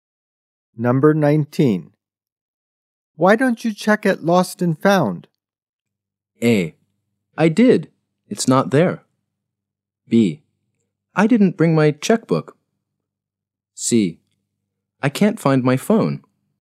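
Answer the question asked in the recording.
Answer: A: I did. It's not there.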